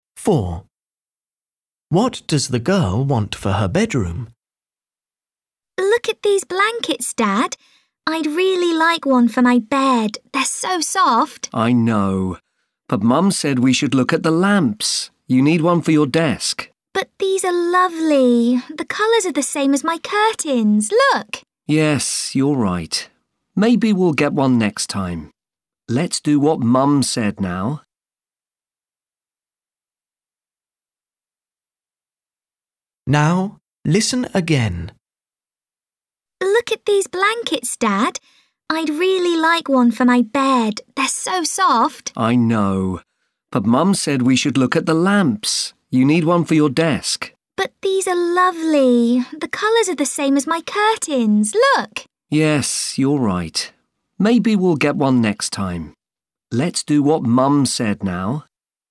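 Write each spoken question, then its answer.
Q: What does the girl want for her bedroom?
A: a blanket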